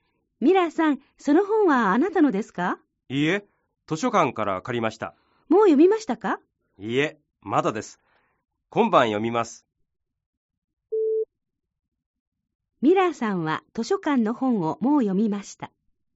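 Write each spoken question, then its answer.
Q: ミラーさんは図書館の本をもう読みました。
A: ×(いいえ、まだです)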